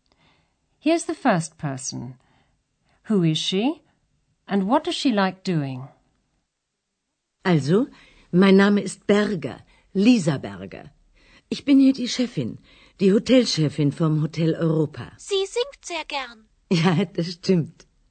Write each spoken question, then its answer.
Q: Who is she?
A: That was Frau Berger, the manageress of the Hotel Europa.

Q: And what does she like doing?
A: Frau Berger likes singing.